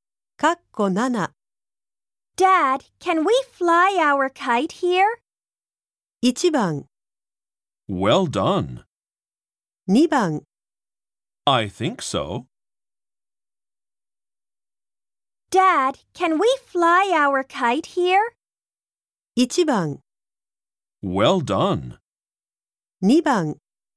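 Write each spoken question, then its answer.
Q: Dad, can we fly our kite here?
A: 2: I think so.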